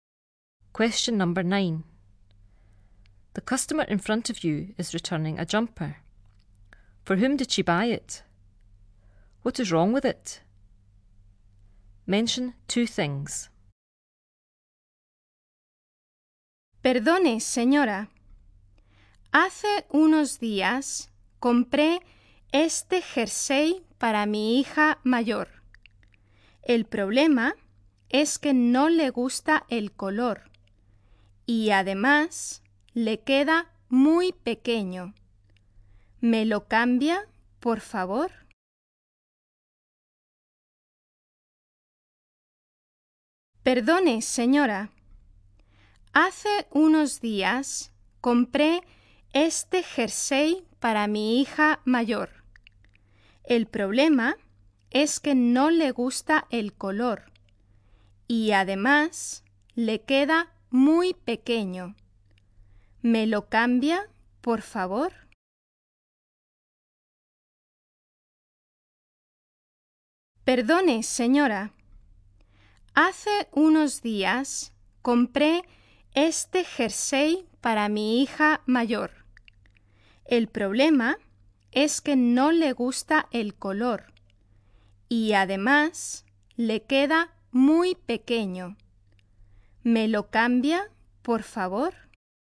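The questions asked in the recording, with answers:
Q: For whom did she buy it?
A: Her eldest daughter

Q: What is wrong with it?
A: Her daughter doesn't like the colour and it is too small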